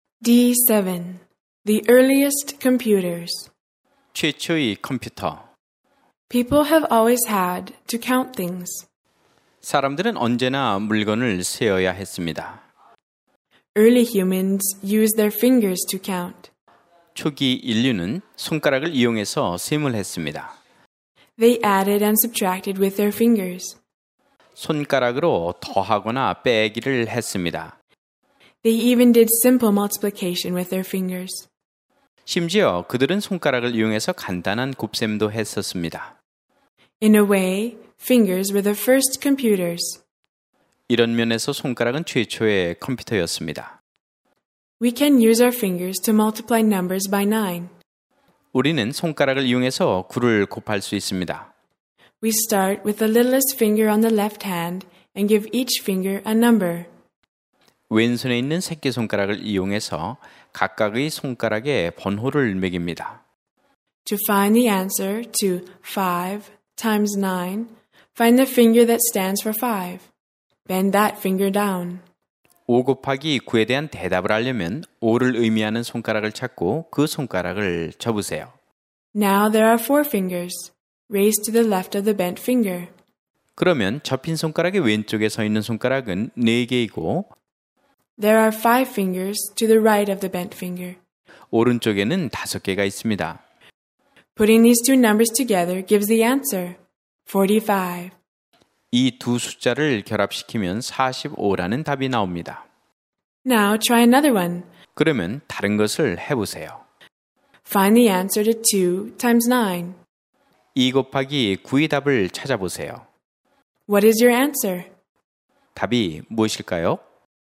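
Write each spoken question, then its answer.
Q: What is your answer?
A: 18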